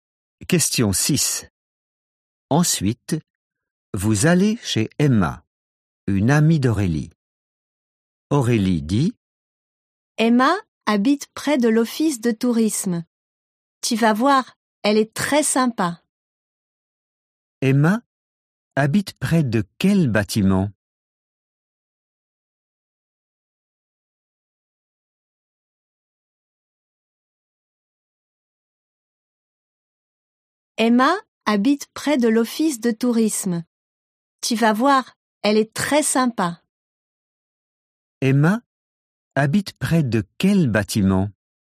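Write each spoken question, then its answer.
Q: Emma habite près de quel bâtiment?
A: L'office de tourisme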